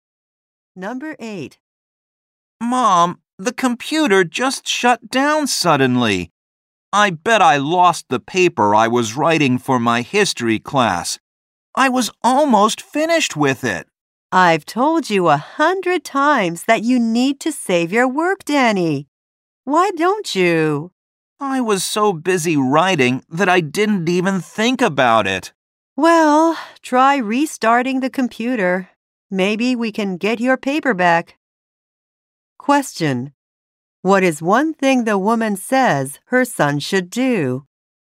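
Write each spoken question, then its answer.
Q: What is one thing the woman says her son should do?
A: Save his work.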